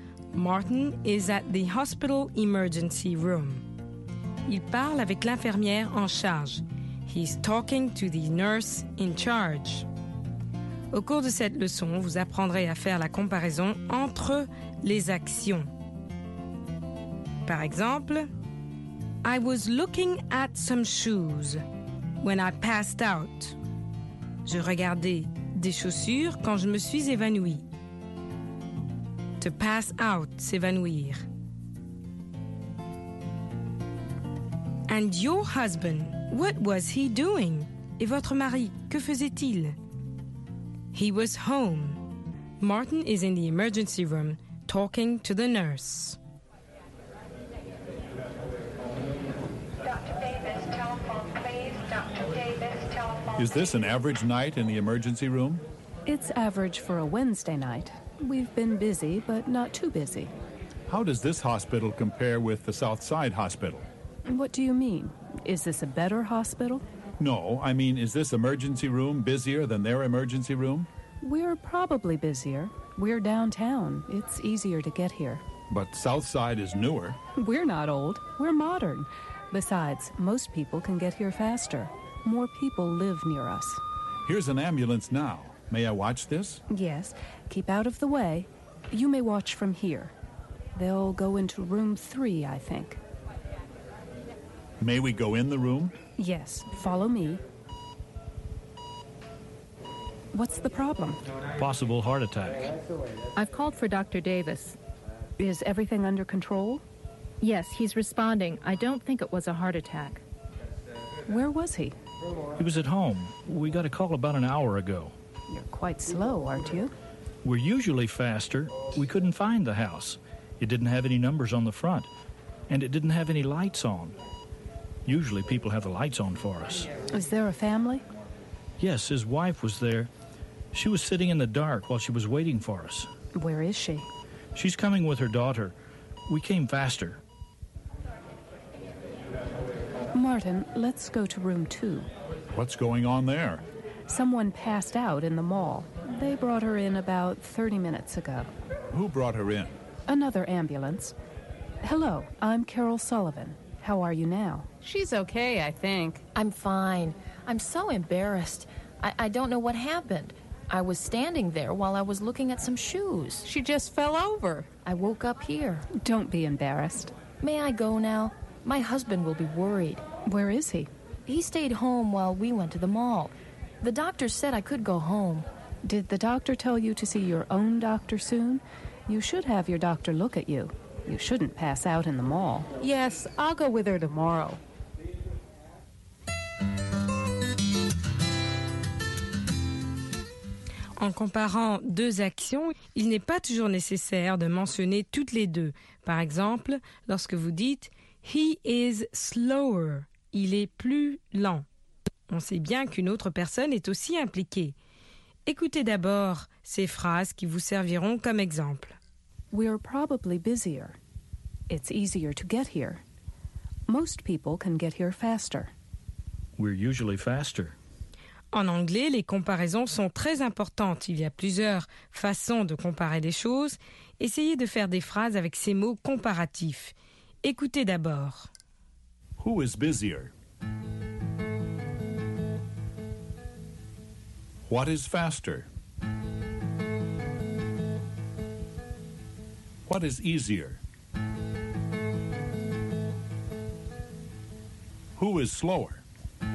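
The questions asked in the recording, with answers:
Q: Who is busier?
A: This (downtown) hospital's emergency room

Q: What is easier?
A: Getting to this downtown hospital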